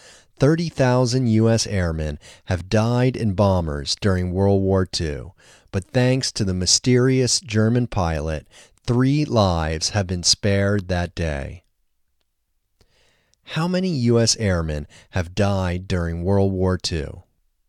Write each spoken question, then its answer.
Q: How many U.S. airmen have died during World War II?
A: 30,000 U.S. airmen have died during World War II.